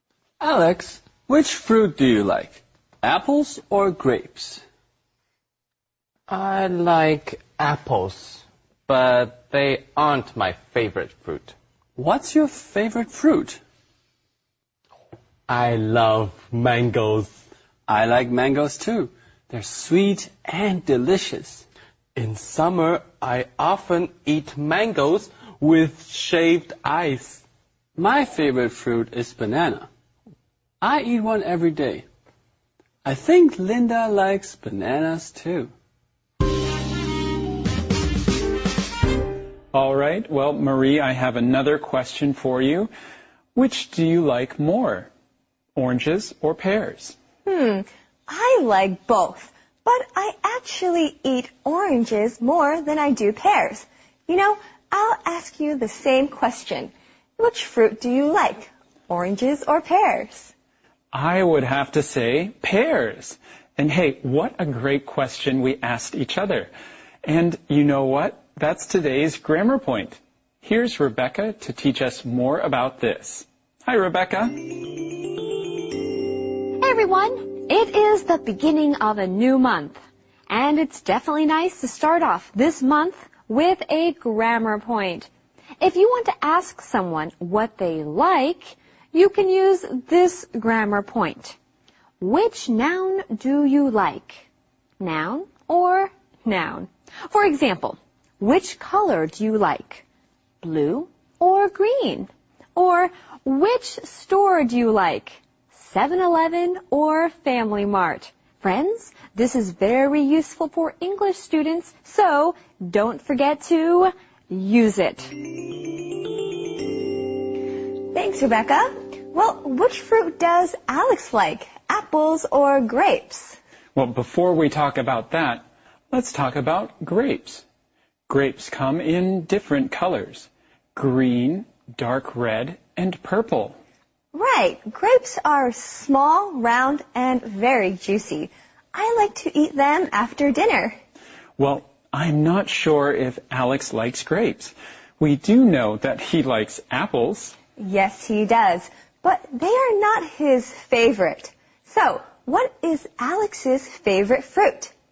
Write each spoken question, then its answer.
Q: So, what is Alex's favorite fruit?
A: He loves mangoes.